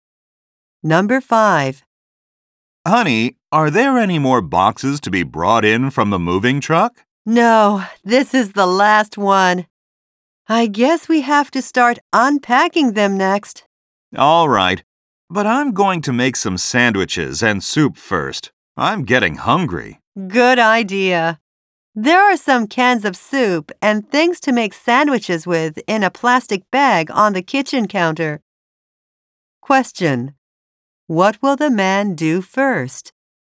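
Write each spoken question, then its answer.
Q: What will the man do first?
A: Make sandwiches and soup.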